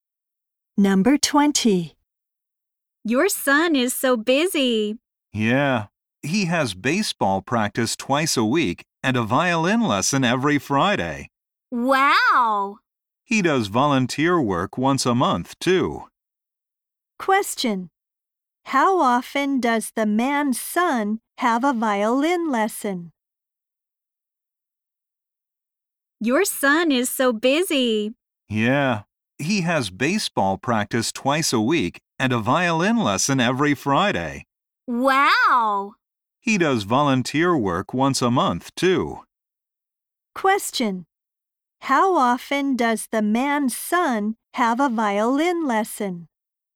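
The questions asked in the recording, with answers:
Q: How often does the man's son have a violin lesson?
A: Once a week (every Friday)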